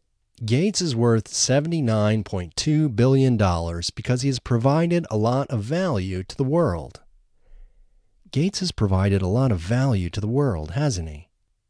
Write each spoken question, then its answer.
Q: Gates has provided a lot of value to the world, hasn't he?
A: Yes, Gates has provided a lot of value to the world.